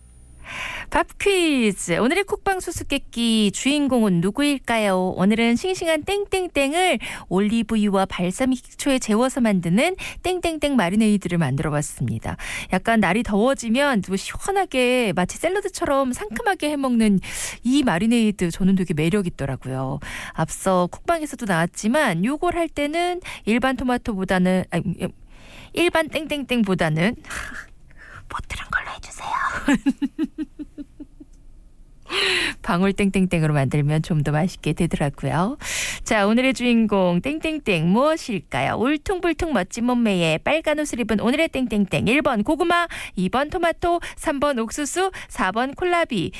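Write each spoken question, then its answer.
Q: 자, 오늘의 주인공 땡땡땡 무엇일까요?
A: 2번: 토마토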